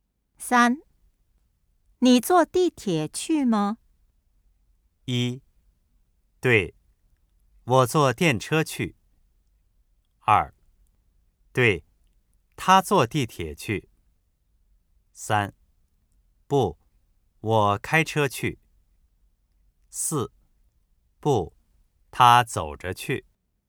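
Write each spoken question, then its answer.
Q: 你坐地铁去吗?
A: 三: 不,我开车去。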